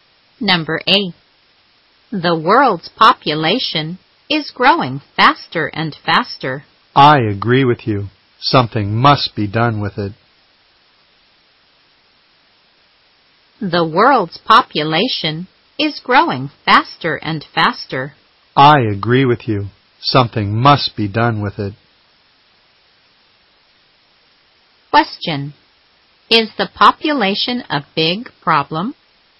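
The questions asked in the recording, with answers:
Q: Is the population a big problem?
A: Yes, it is growing faster and faster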